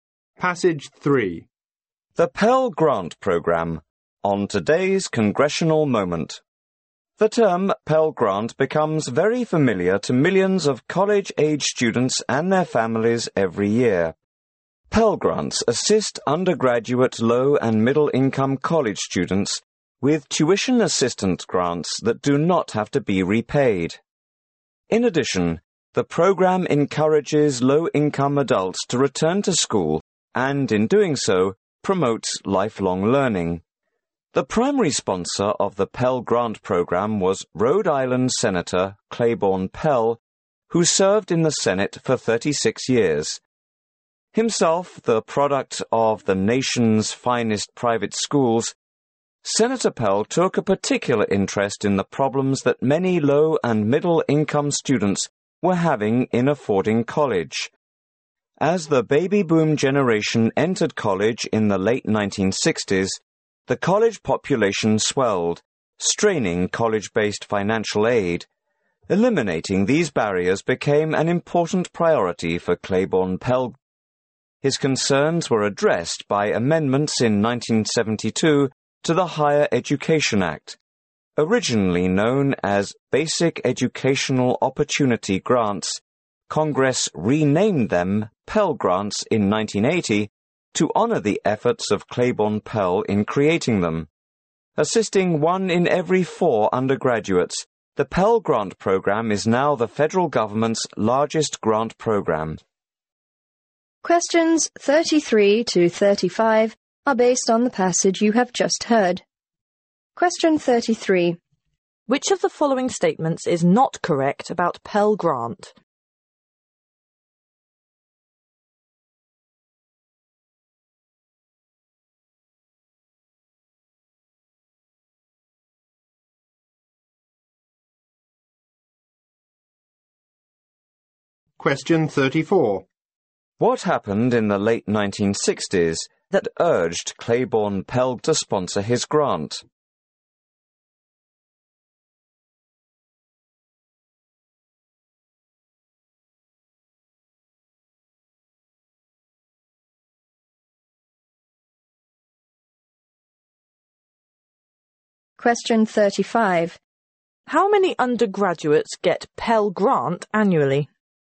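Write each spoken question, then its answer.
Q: What happened in the late 1960s that urged Claiborne Pell to sponsor his grant?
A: The baby boom swelled the college population, straining financial aid

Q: How many undergraduates get Pell Grant annually?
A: One in every four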